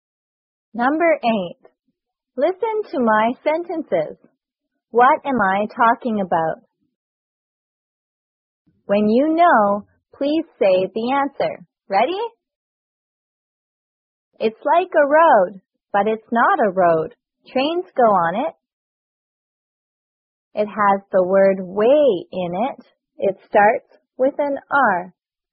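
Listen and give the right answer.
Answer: A railway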